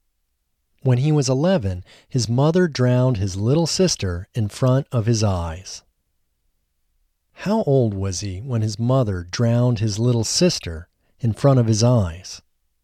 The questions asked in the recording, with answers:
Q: How old was he when his mother drowned his little sister in front of his eyes?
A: He was 11 when his mother drowned his little sister in front of his eyes.